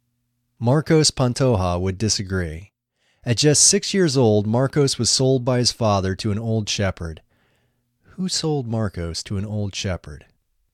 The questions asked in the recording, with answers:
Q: Who sold Marcos to an old shepherd?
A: His father sold Marcos to an old shepherd.